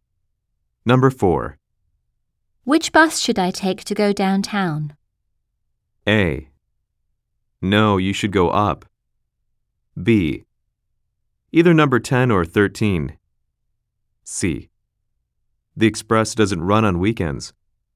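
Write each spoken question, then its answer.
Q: Which bus should I take to go downtown?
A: B: Either number 10 or 13.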